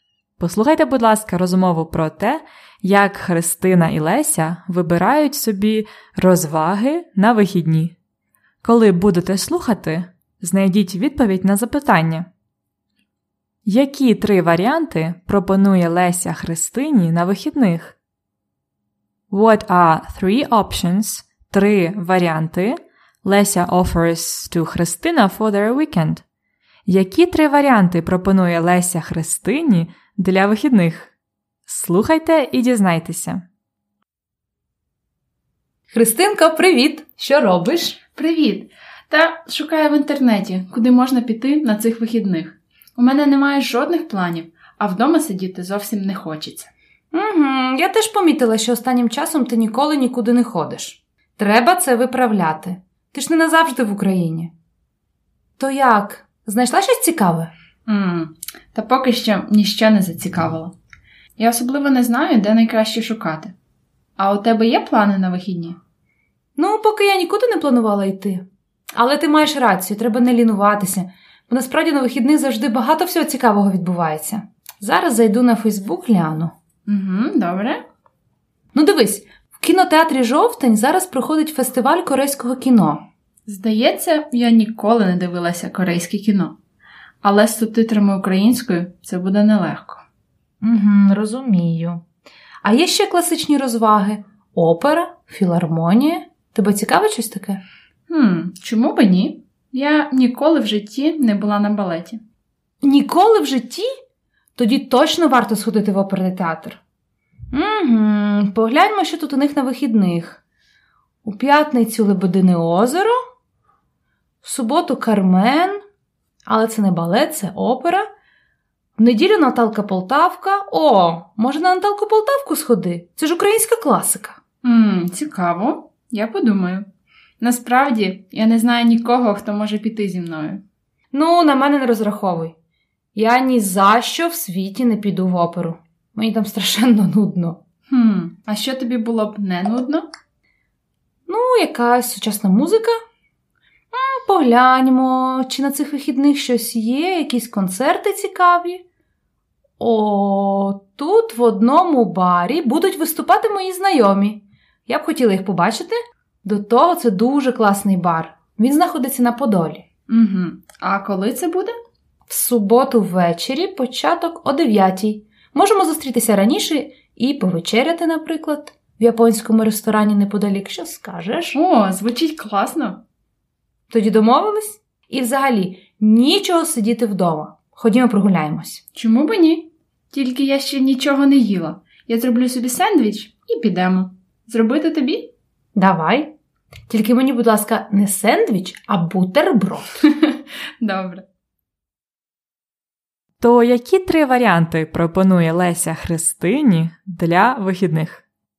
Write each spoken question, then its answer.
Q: То які три варіанти пропонує Леся Христині для вихідних?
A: Ось такі три варіанти: кіно, опера або концерт.